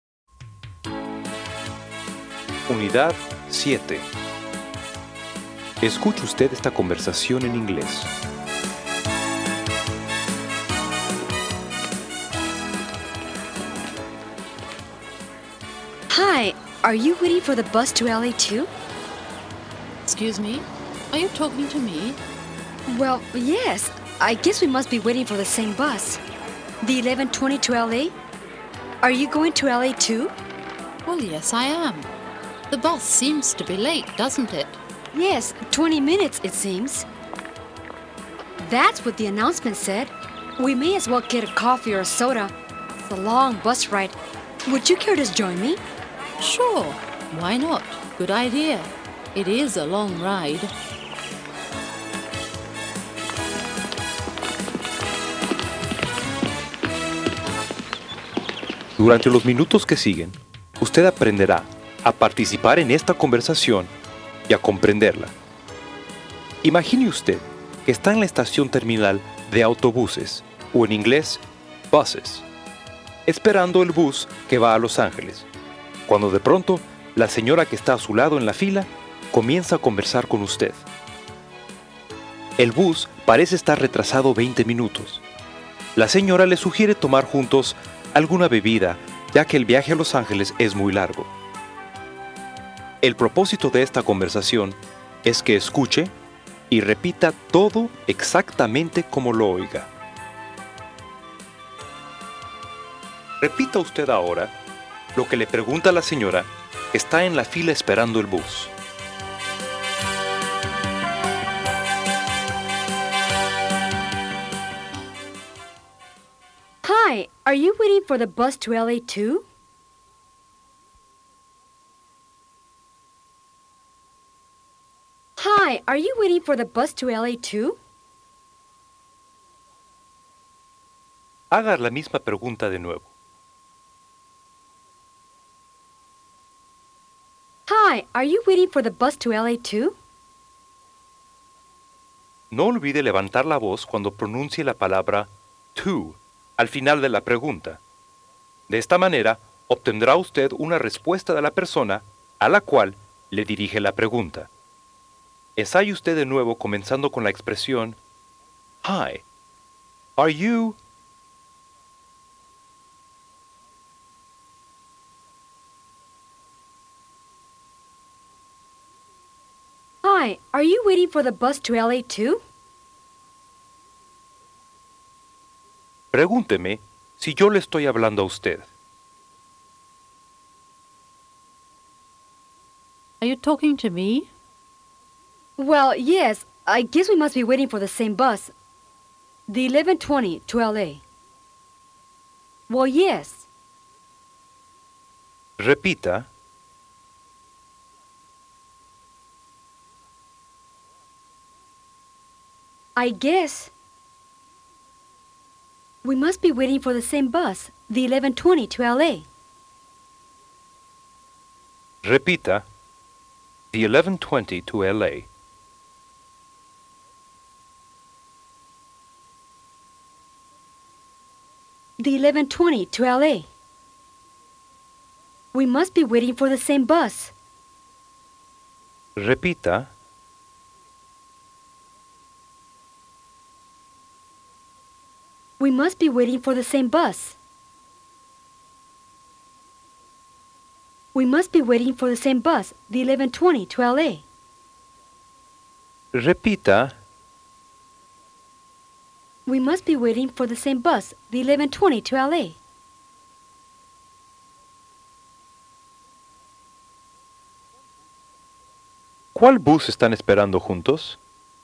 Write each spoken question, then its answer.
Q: ¿Cuál bus están esperando juntos?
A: The 1120 to LA.